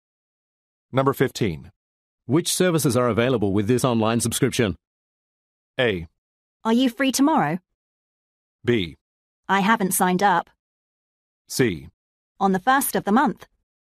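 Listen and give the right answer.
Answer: B: I haven't signed up.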